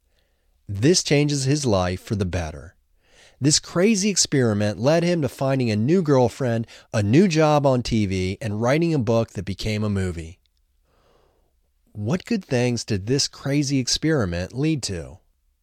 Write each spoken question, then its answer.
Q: What good things did this crazy experiment lead to?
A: This crazy experiment led him to finding a new girlfriend, a new job on TV, and writing a book that became a movie.